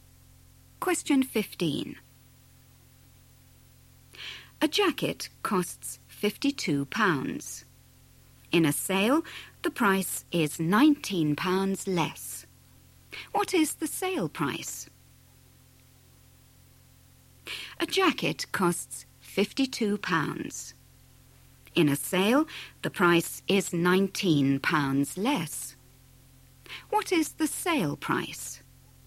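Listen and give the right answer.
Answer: £33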